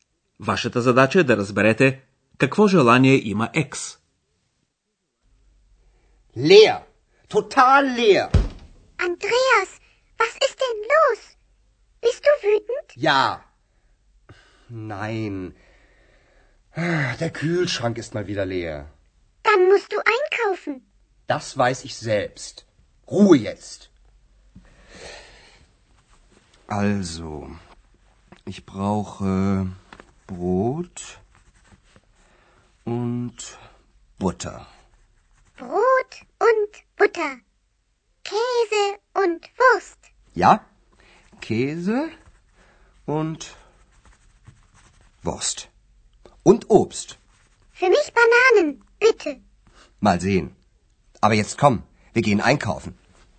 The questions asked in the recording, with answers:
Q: Вашата задача е да разберете какво желание има екс.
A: Екс иска банани.